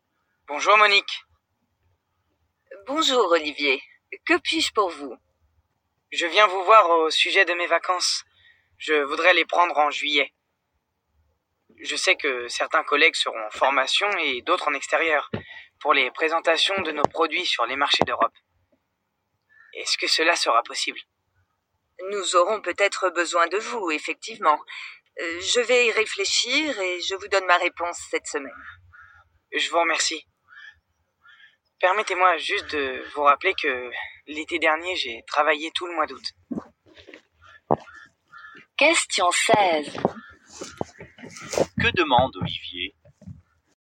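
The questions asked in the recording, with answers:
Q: Que demande Olivier?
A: Prendre ses vacances en juillet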